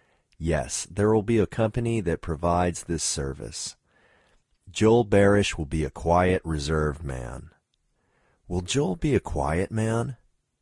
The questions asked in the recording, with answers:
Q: Will Joel be a quiet man?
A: Yes, Joel will be a quiet man.